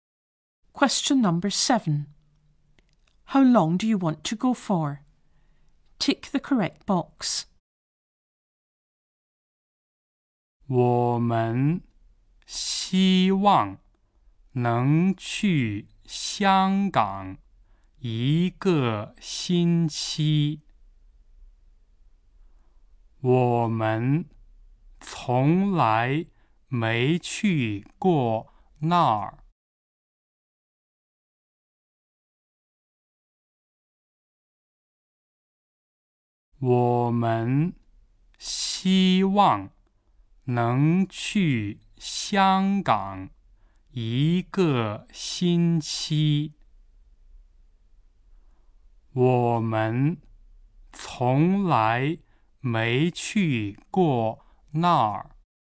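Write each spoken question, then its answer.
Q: How long do you want to go for?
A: One week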